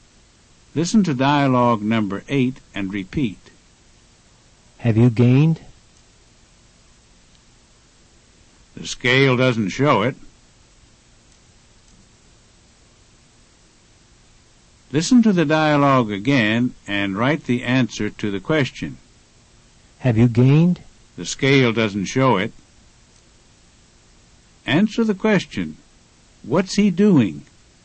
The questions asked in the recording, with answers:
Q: What's he doing?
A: He's checking his weight.